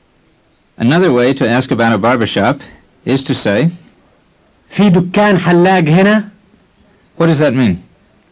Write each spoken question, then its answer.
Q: What does that mean?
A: It means, is there a barbershop here?